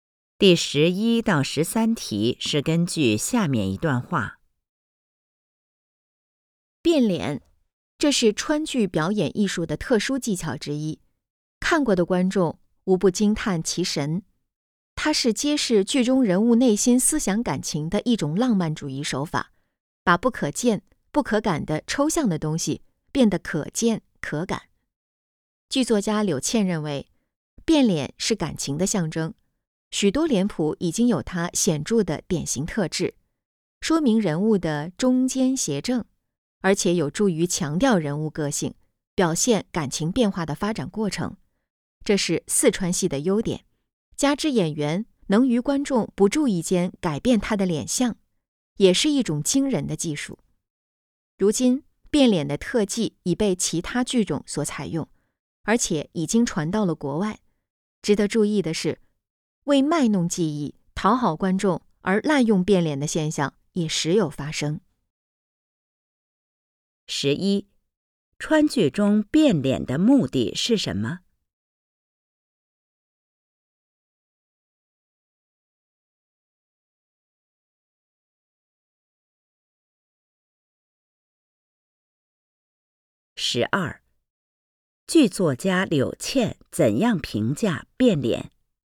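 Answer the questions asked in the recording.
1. 揭示剧中人物的内心思想感情
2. 变脸是感情的象征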